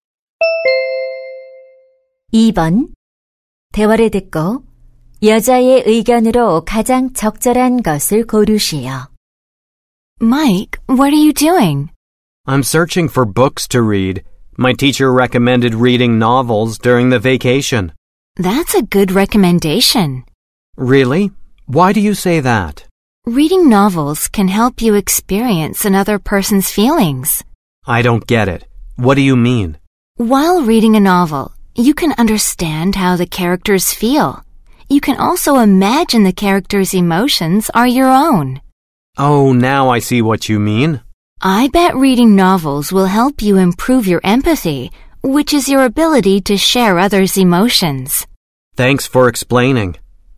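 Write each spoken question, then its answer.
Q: 대화를 듣고 여자의 의견으로 가장 적절한 것을 고르시오.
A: 소설 읽기는 공감 능력 향상에 도움이 된다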